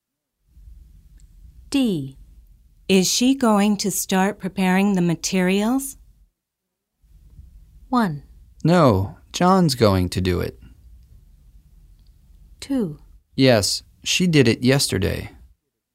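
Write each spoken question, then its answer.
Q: Is she going to start preparing the materials?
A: 1: No, John's going to do it.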